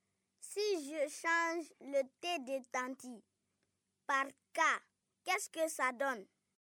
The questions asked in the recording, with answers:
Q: Si je change le T de Tanti par K, qu'est-ce que ça donne?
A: C'est Kanti.